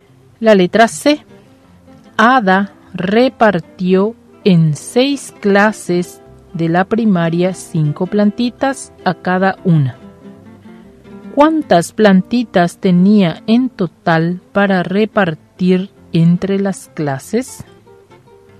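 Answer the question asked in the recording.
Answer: 30 plantitas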